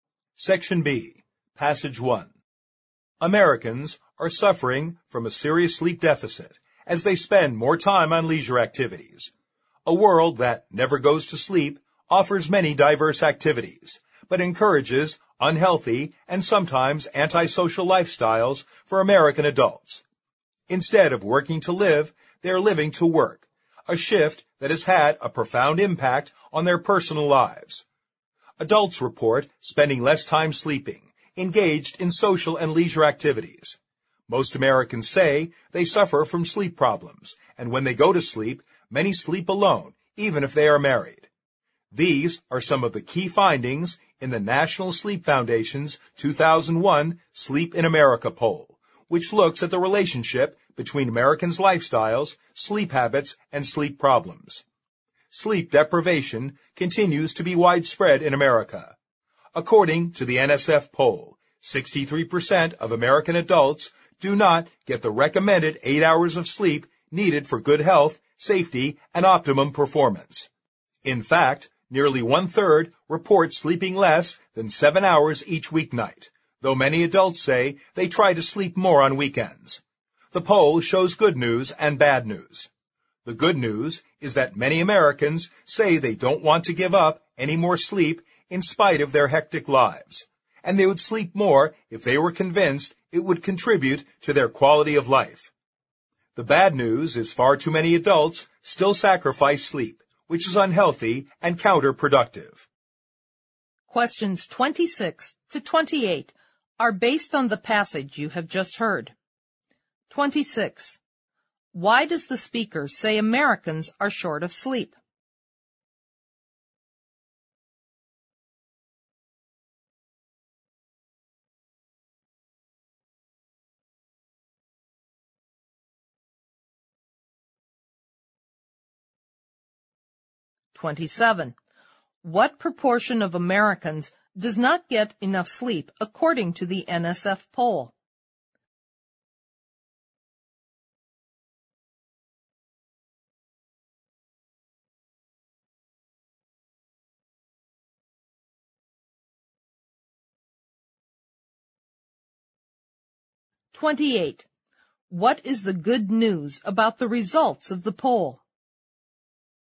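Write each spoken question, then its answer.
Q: Why does the speaker say Americans are short of sleep?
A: They spend more time on leisure activities (and work)

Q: What proportion of Americans does not get enough sleep according to the NSF poll?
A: 63%

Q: What is the good news about the results of the poll?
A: Many Americans don't want to give up any more sleep and would sleep more if convinced it improves their quality of life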